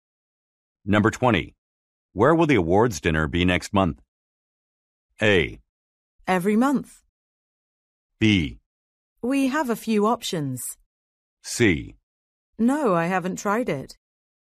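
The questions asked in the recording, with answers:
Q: Where will the awards dinner be next month?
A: B: We have a few options.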